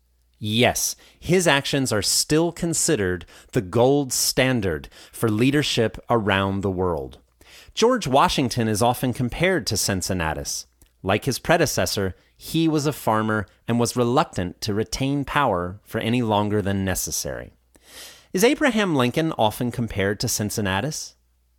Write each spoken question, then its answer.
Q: Is Abraham Lincoln often compared to Cincinnatus?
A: No. George Washington is often compared to Cincinnatus.